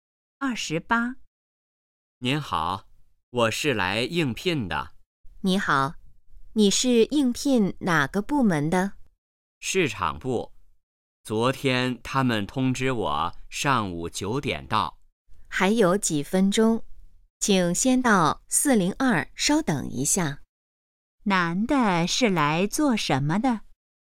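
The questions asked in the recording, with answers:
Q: 男的是来做什么的?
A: 应聘(市场部)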